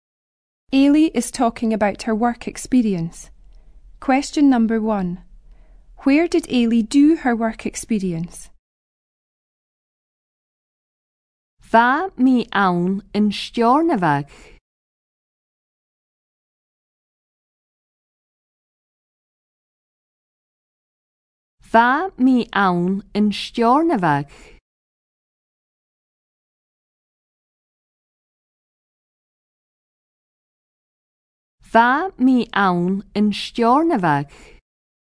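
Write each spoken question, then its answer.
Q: Where did Ailey do her work experience?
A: In Stornoway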